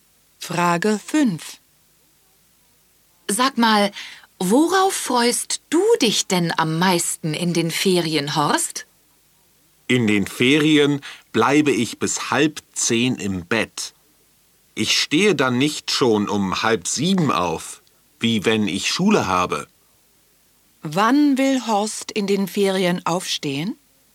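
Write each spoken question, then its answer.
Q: Wann will Horst in den Ferien aufstehen?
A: Um 9:30 Uhr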